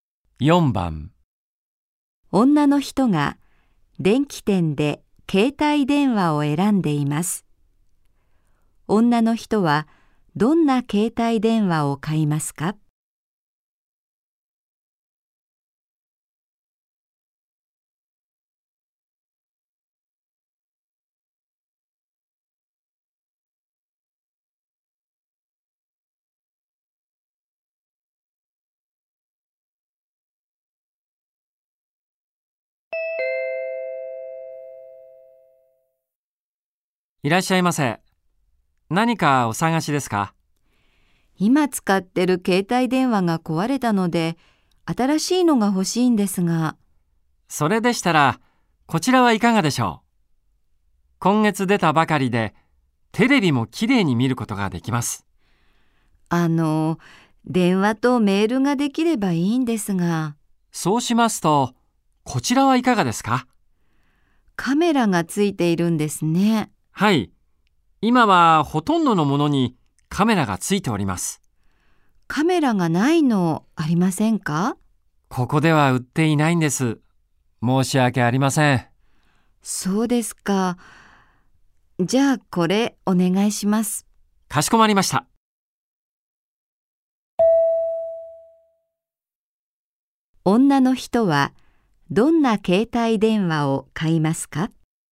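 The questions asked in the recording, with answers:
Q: 女の人はどんな携帯電話を買いますか?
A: テレビは見られないが、カメラがついている携帯電話(電話とメールができるもの)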